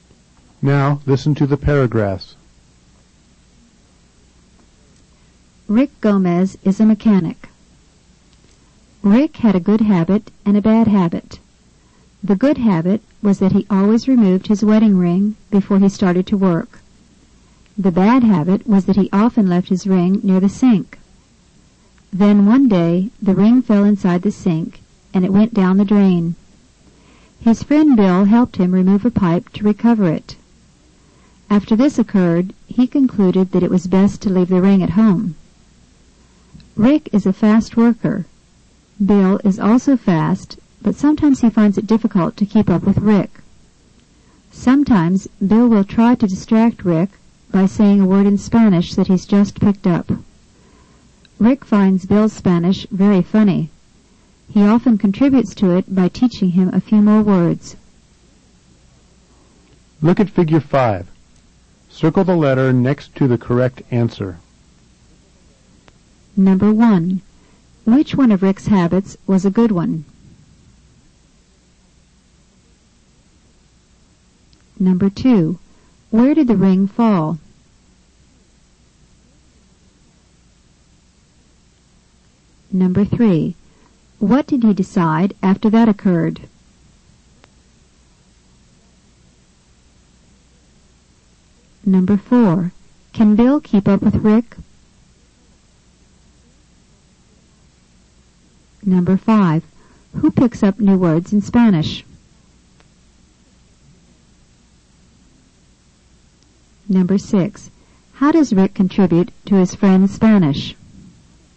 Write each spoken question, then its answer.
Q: Which one of Rick's habits was a good one?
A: Removing his ring before he started to work

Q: Where did the ring fall?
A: It fell down the drain.

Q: What did he decide after that occurred?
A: He concluded that it was best

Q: Can Bill keep up with Rick?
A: No, Bill isn't as fast as Rick.

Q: Who picks up new words in Spanish?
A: Bill learns new words in Spanish.

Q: How does Rick contribute to his friend's Spanish?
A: By teaching him more words in Spanish.